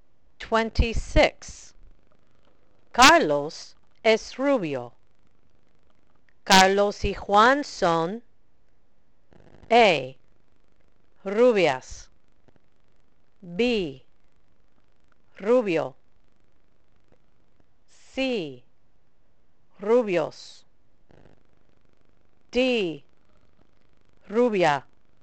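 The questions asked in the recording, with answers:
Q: Carlos es rubio. Carlos y Juan son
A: C: rubios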